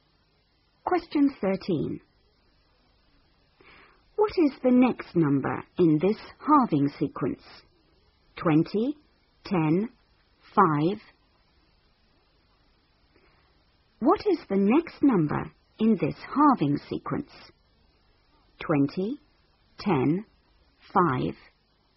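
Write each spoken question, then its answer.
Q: What is the next number in this halving sequence?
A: 2.5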